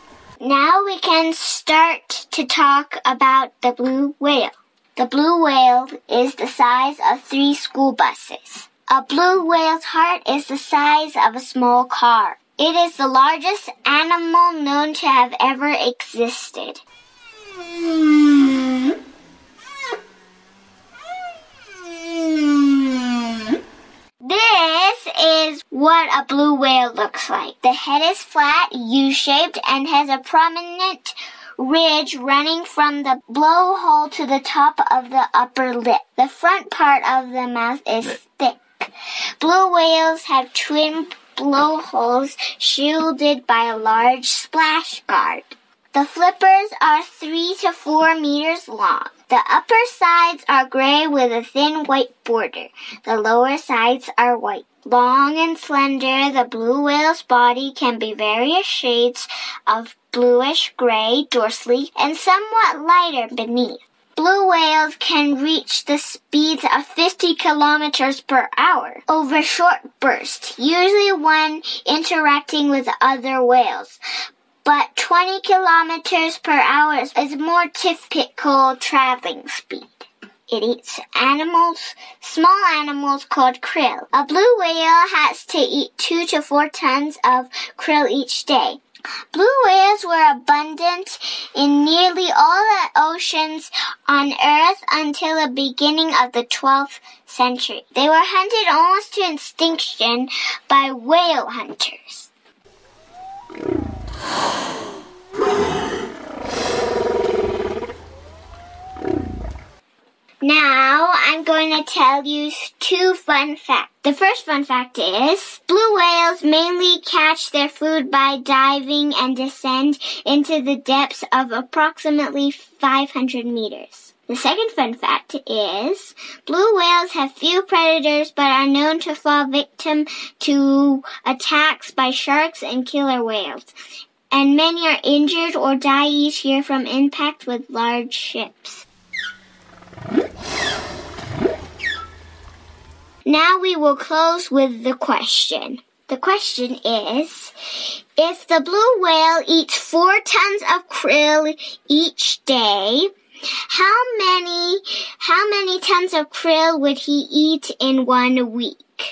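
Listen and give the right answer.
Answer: 28 tons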